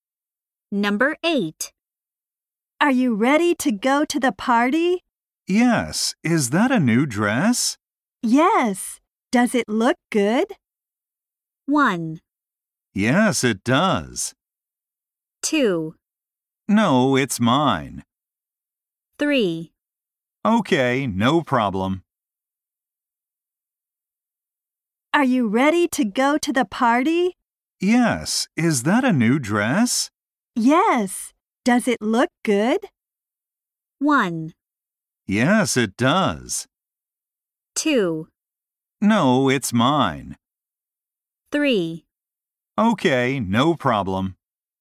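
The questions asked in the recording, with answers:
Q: Yes. Does it look good?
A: 1: Yes, it does.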